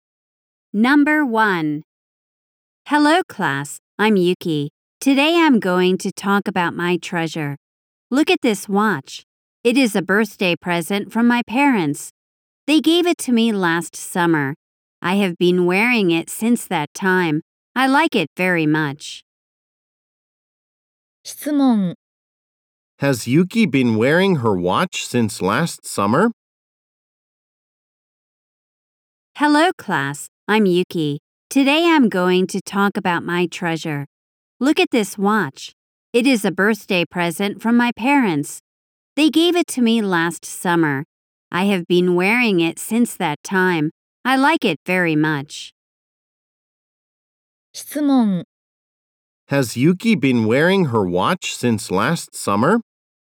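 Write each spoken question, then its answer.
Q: Has Yuki been wearing her watch since last summer?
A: Yes, she has.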